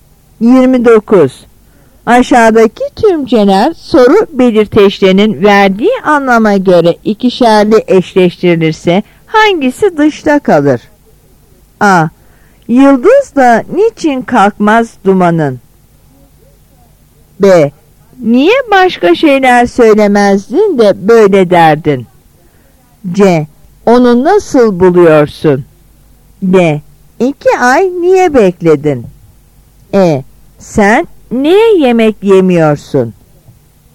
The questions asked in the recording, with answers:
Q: Aşağıdaki tümceler soru belirteçlerinin verdiği anlama göre ikişerli eşleştirilirse hangisi dışta kalır?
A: Yanıt C.